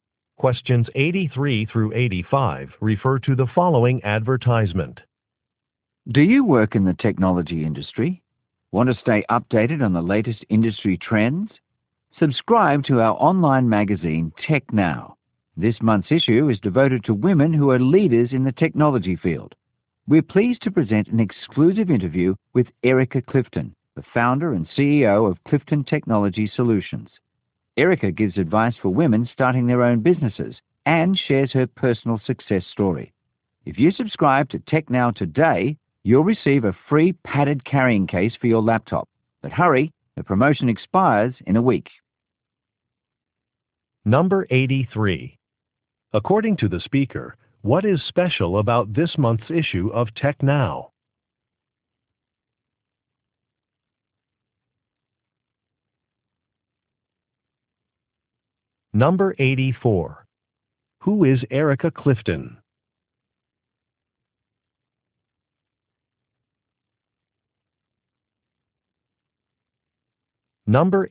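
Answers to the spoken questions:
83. It is devoted to women leaders in technology
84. Founder and CEO of Clifton Technology Solutions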